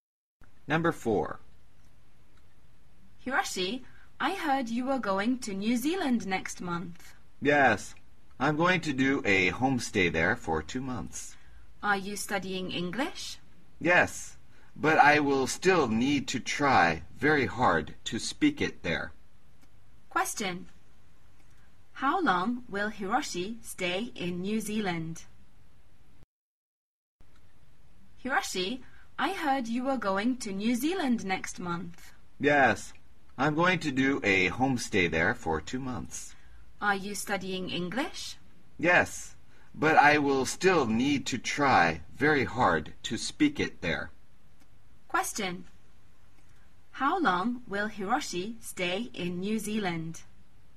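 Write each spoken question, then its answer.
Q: How long will Hiroshi stay in New Zealand?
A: For 2 months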